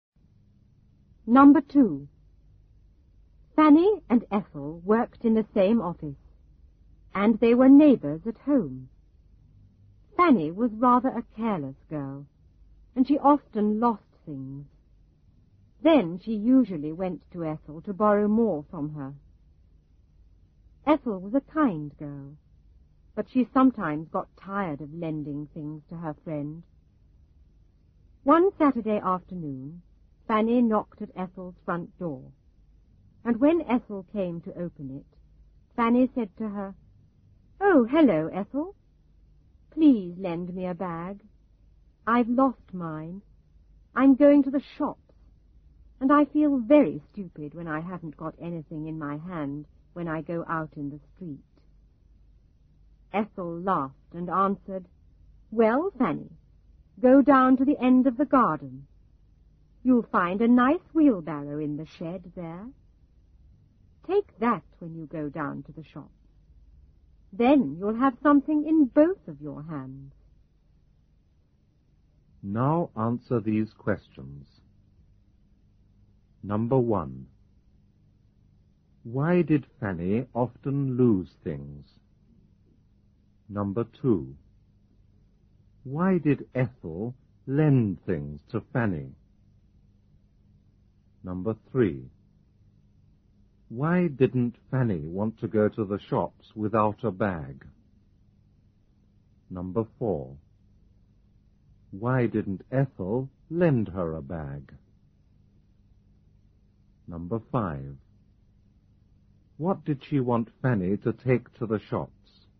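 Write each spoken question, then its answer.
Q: Why did Fanny often lose things?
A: Because she was rather a careless girl.

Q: Why did Ethel lend things to Fanny?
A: Because she was a kind girl (and her friend and neighbor).

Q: Why didn't Fanny want to go to the shops without a bag?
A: She felt very stupid with nothing in her hand in the street.

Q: What did she want Fanny to take to the shops?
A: A wheelbarrow from the shed.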